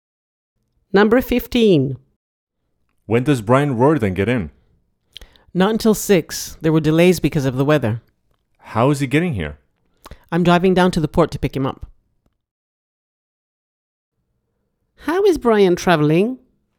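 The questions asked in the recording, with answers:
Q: How is Brian traveling?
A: By boat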